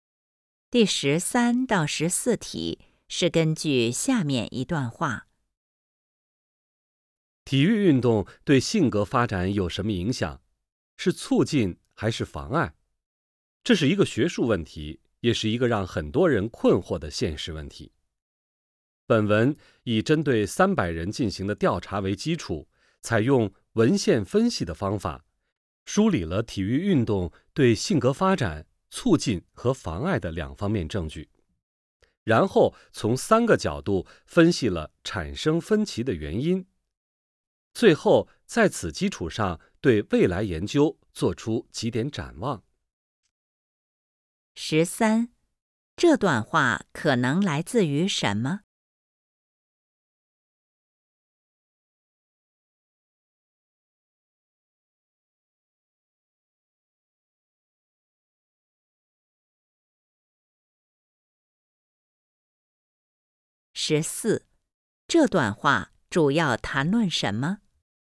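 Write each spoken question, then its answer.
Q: 这段话可能来自于什么?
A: 一篇论文(的摘要)

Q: 这段话主要谈论什么?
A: 体育运动对性格发展的影响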